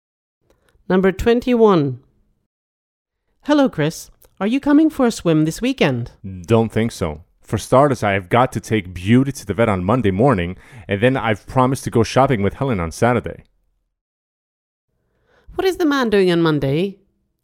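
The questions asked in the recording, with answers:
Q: What is the man doing on Monday?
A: taking Beauty to the vet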